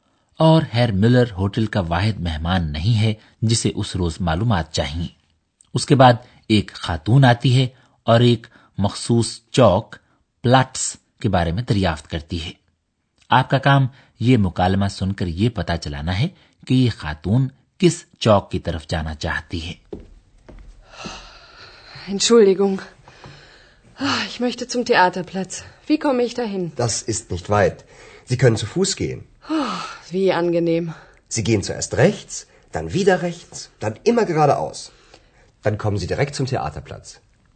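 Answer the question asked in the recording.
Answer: theatre چوک (Theaterplatz)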